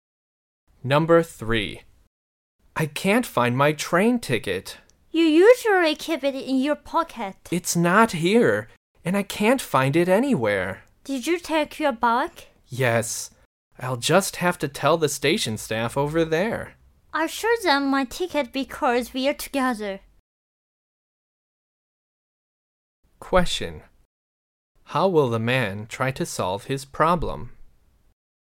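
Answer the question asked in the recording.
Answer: He will tell the station staff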